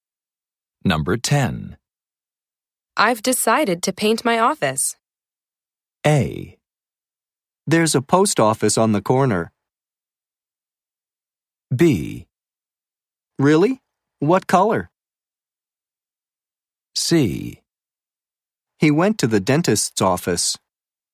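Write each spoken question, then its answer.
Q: I've decided to paint my office.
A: B: Really? What color?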